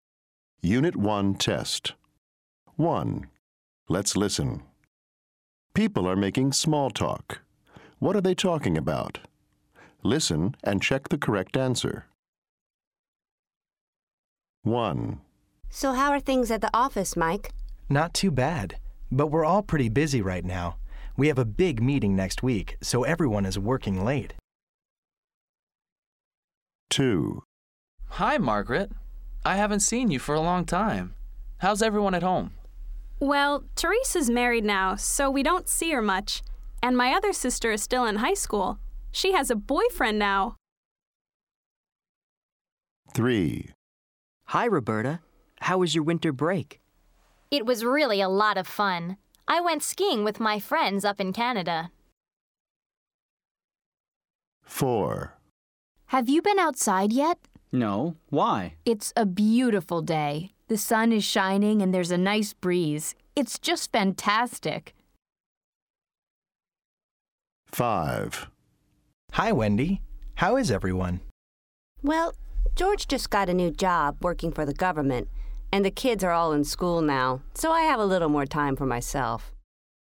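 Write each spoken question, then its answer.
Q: What are they talking about?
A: work

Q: What are they talking about?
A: family

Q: What are they talking about?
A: winter break / vacation

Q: What are they talking about?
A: the weather

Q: What are they talking about?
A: family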